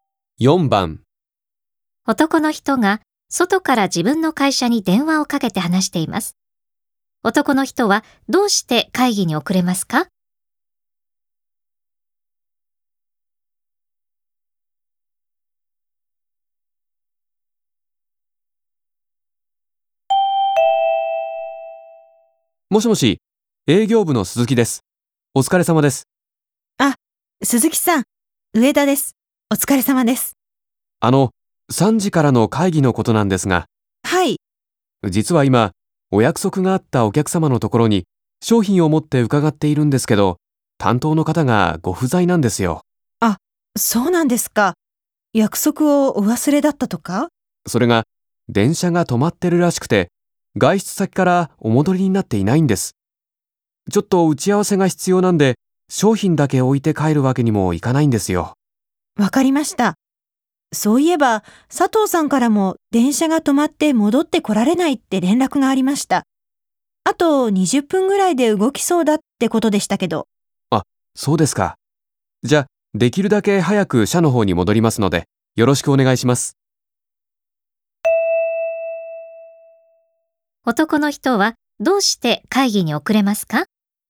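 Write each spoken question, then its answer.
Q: 男の人はどうして会議に遅れますか?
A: お客様の担当者が電車が止まっていて戻っておらず、打ち合わせが必要で待っているから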